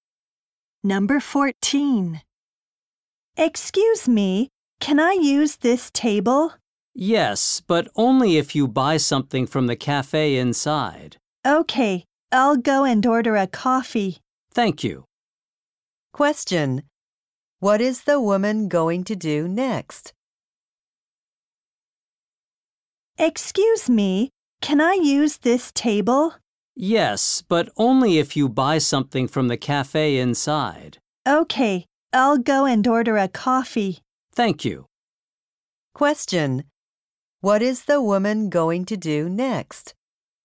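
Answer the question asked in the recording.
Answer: Order a coffee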